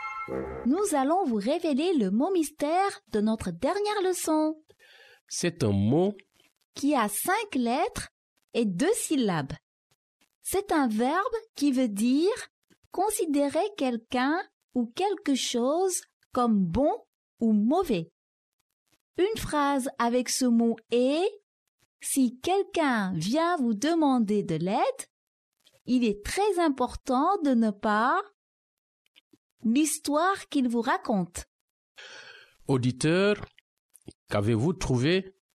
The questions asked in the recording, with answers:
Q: Auditeur, qu'avez-vous trouvé?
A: Le mot mystère d'aujourd'hui est « juger ».